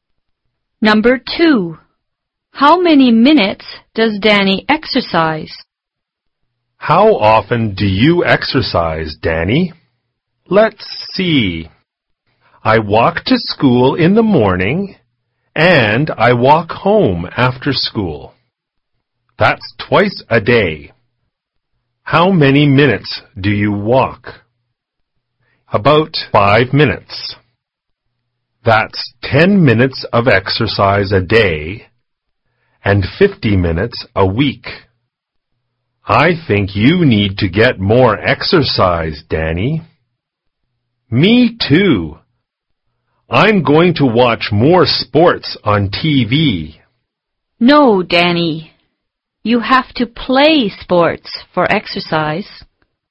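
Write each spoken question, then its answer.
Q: How many minutes does Danny exercise?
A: 10 minutes a day (50 minutes a week)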